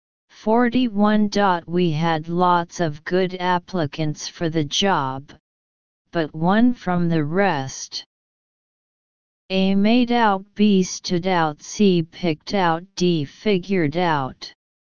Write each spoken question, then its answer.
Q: We had lots of good applicants for the job, but one from the rest.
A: Answer B.